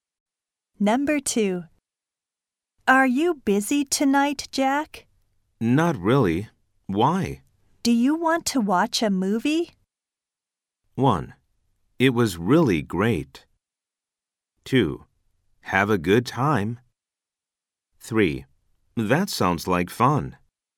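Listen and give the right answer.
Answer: 3: That sounds like fun.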